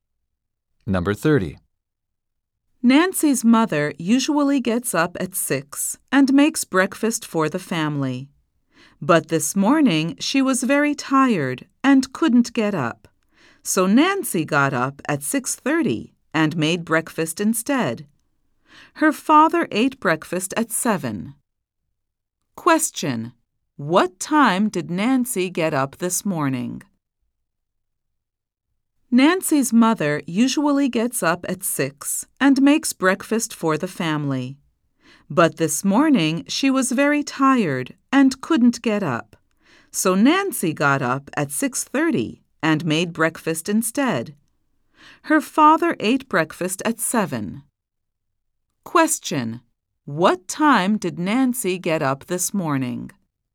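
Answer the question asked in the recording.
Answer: At 6:30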